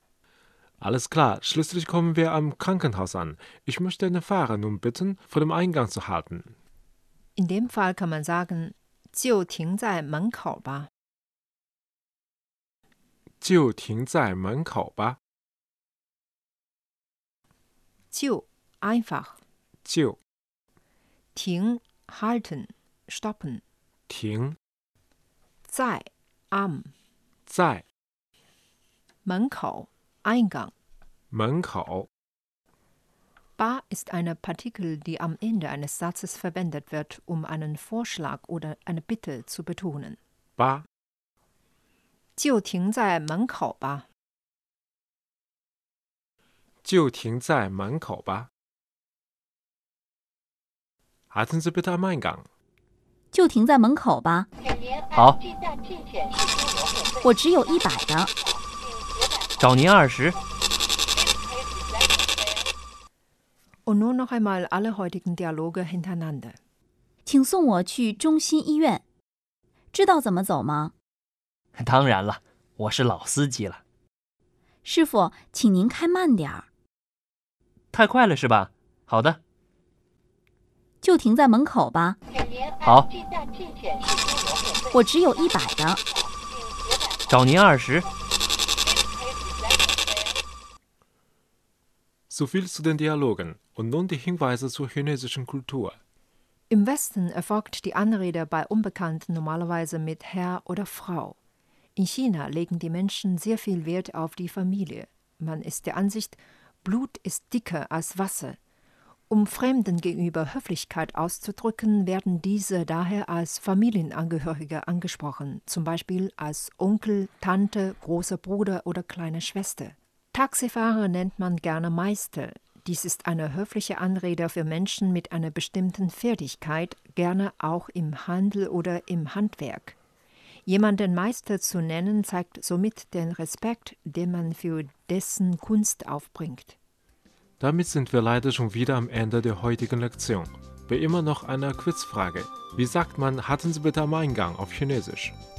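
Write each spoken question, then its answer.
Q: Wie sagt man, hatten Sie bitte am Eingang auf Chinesisch?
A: 就停在门口吧。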